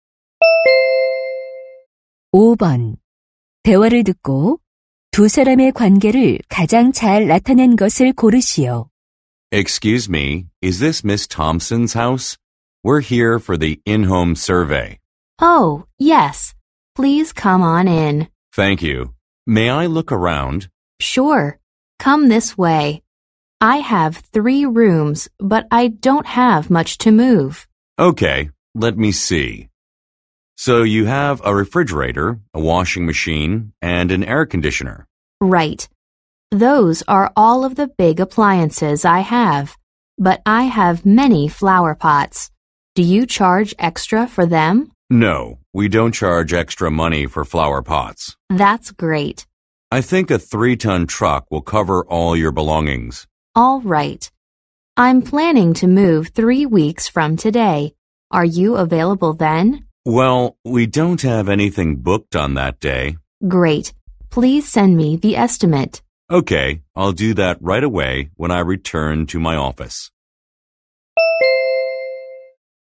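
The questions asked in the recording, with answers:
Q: 대화를 듣고 두 사람의 관계를 가장 잘 나타낸 것을 고르시오.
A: 이사 의뢰인 - 이삿짐 센터 직원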